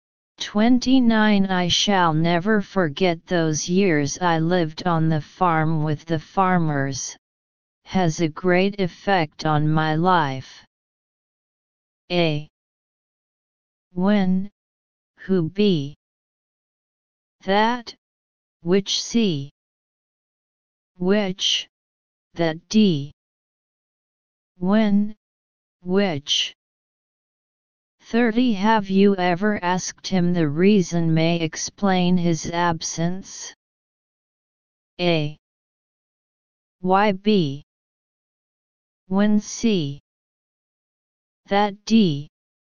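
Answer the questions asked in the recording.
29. D: When, which
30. C: That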